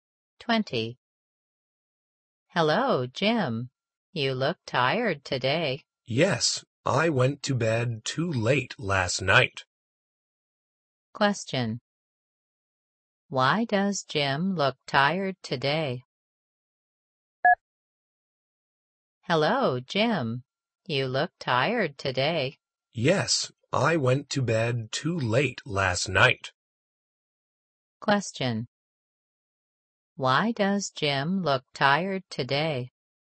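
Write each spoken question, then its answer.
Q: Why does Jim look tired today?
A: He went to bed too late last night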